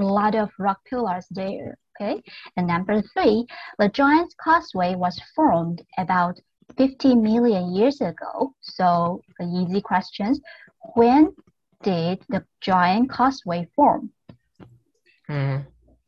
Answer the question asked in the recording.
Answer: It formed about 50 million years ago.